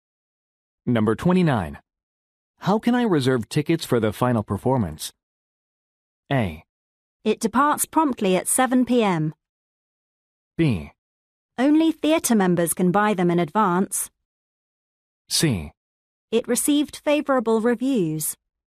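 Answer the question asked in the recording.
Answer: B: Only theatre members can buy them in advance.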